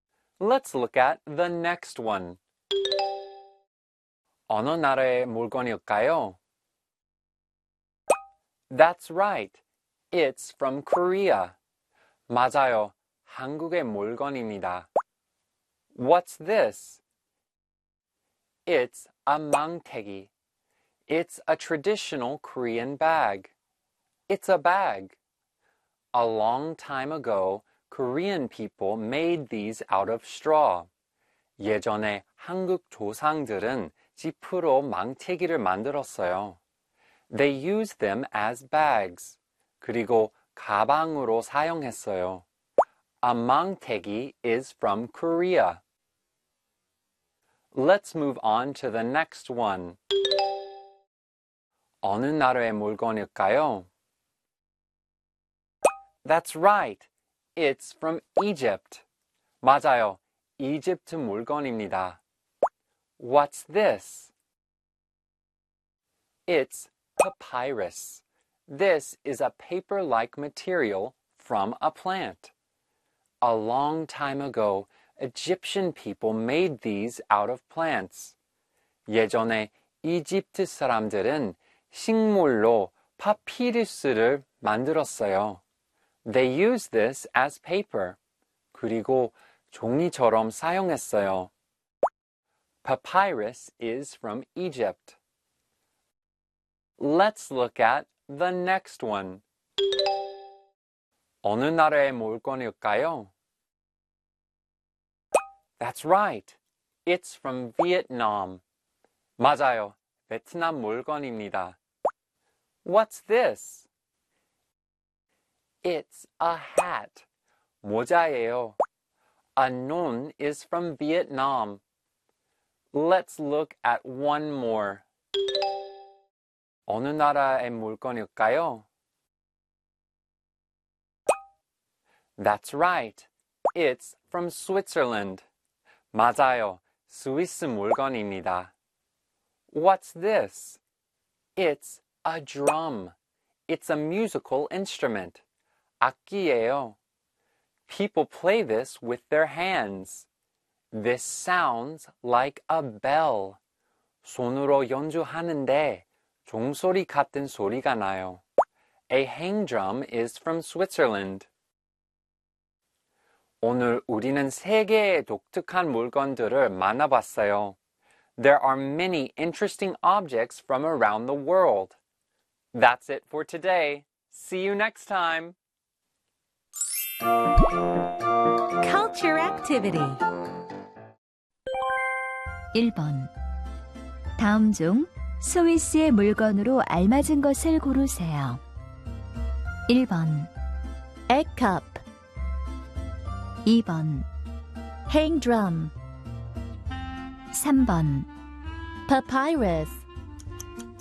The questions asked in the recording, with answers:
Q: 다음 중 스위스의 물건으로 알맞은 것을 고르세요.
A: 행드럼.